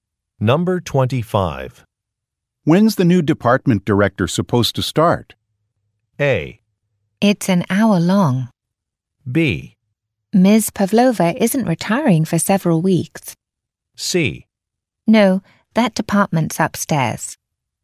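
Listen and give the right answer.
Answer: B: Ms. Pavlova isn't retiring for several weeks.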